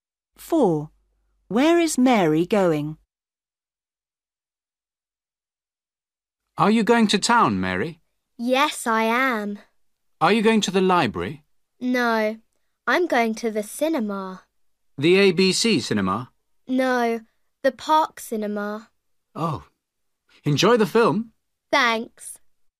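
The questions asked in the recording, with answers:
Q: Where is Mary going?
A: to the park cinema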